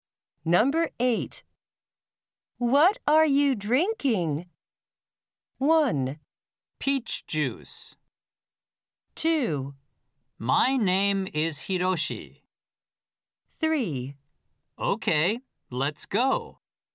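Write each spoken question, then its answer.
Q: What are you drinking?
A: 1: Peach juice.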